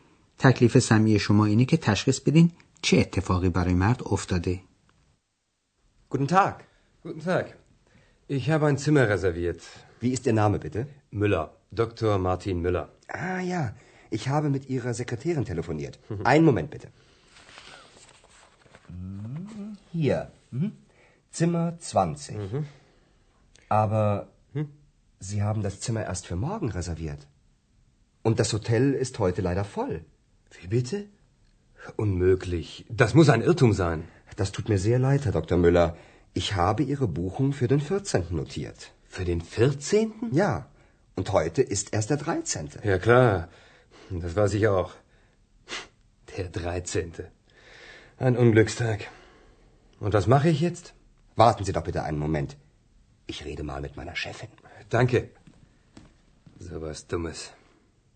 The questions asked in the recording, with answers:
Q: تکلیف سمی شما اینه که تشخیص بدین چه اتفاقی برای مرد افتاده.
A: پس برای آقای مولر واقعه مضحک یا به قول خود او ابلهانه اتفاق افتاده به این ترتیب که او هنگام رزرو کردن اتاق در هتل اروپا در تاریخ روزش اشتباه کرده، یعنی برای یک روز دیرتر رزرو کرده.